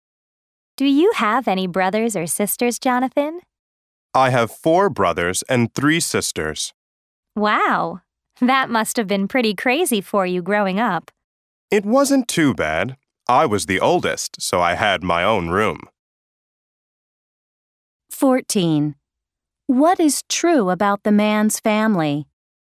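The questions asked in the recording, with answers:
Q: What is true about the man's family?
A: He is the oldest of eight children (4 brothers and 3 sisters)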